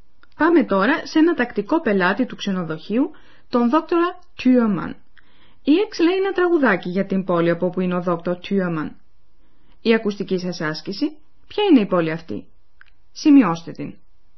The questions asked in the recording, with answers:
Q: ποια είναι η πόλη αυτή.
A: Berlin. Υπογραμμίστε το δεύτερο γράμμα της.